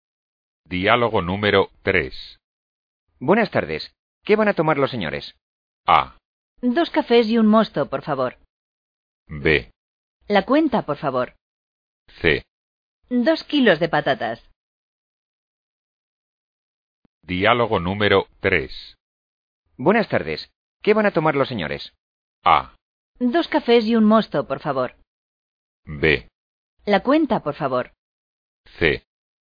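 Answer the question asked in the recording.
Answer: A: 2 cafés y un mosto, por favor.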